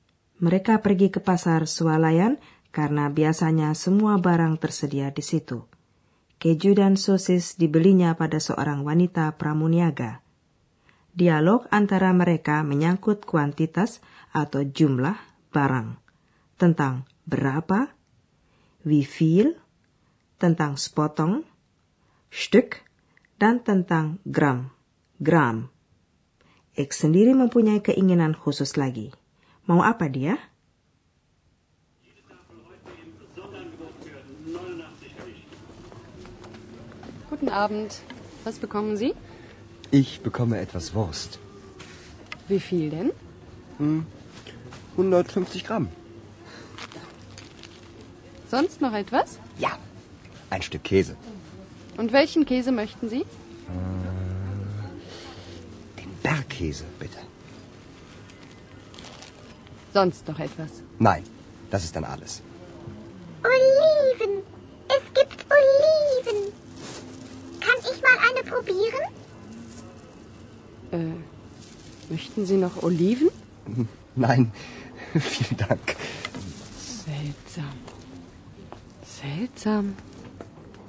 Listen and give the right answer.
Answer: X melihat buah zaitun dalam stoples dan ingin mencobanya.